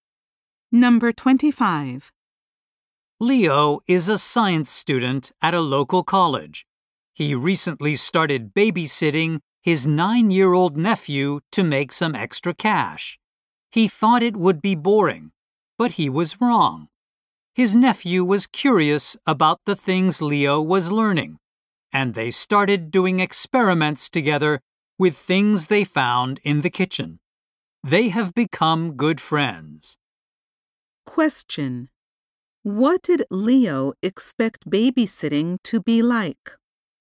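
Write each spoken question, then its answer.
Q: What did Leo expect babysitting to be like?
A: Boring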